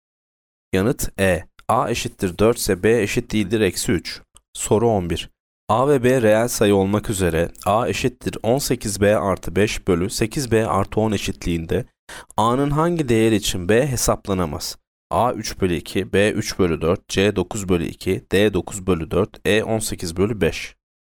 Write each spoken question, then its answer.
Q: Soru 11. A ve B reel sayı olmak üzere A eşittir 18B artı 5 bölü 8B artı 10 eşitliğinde A'nın hangi değer için B hesaplanamaz?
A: Yanıt D 9 bölü 4.